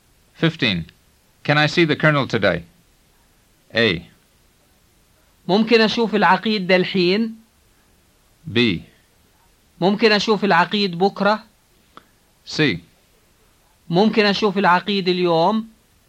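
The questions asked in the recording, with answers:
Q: Can I see the colonel today?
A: C: ممكن أشوف العقيد اليوم.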